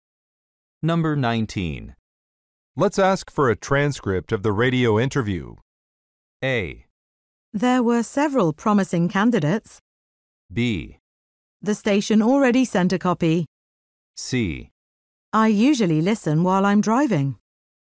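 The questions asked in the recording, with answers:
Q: Let's ask for a transcript of the radio interview.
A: B: The station already sent a copy.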